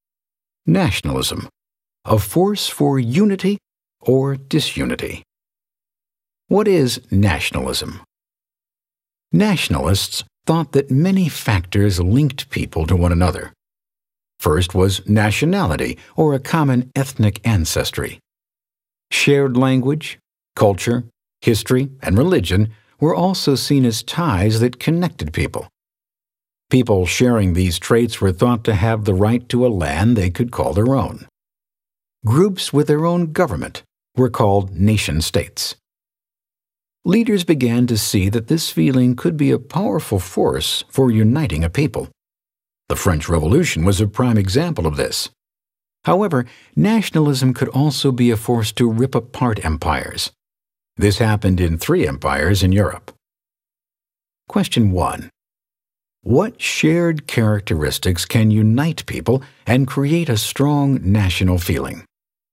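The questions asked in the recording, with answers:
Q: What shared characteristics can unite people and create a strong national feeling?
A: Common ethnic ancestry, language, culture, history, and religion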